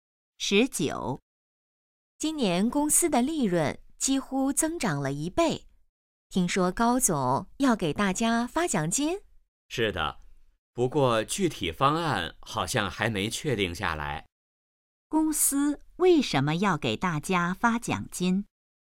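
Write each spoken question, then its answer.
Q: 公司为什么要给大家发奖金?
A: 公司利润增长了将近一倍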